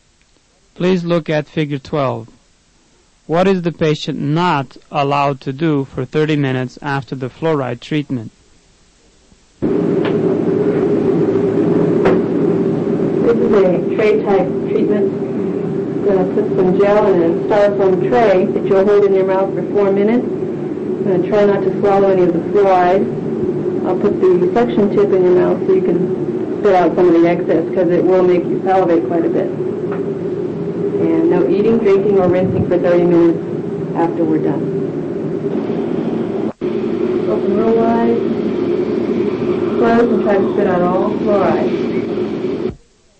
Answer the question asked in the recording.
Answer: No eating, drinking, or rinsing for 30 minutes.